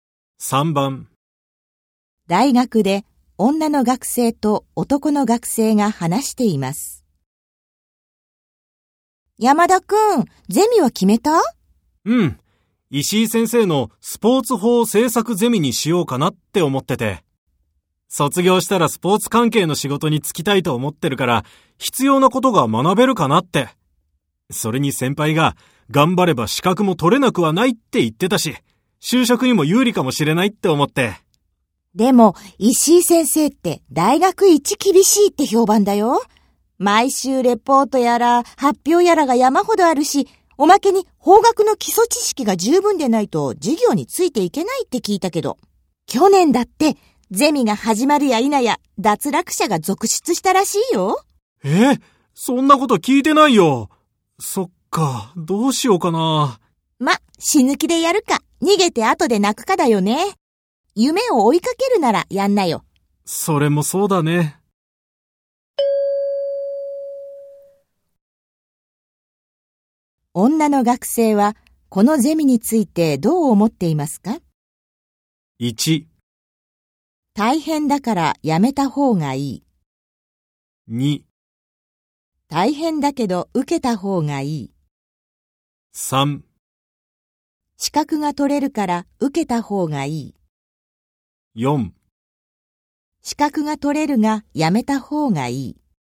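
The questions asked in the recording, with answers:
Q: 女の学生はこのゼミについてどう思っていますか?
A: 2: 大変だけど受けた方がいい。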